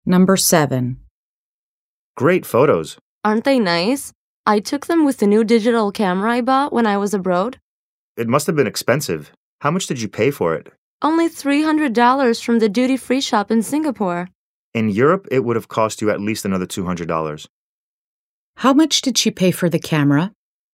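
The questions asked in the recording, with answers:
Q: How much did she pay for the camera?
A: $300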